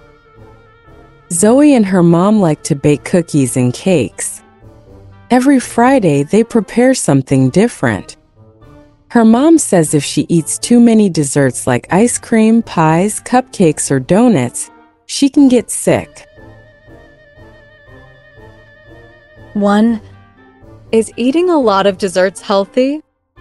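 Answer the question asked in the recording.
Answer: No, it can make you sick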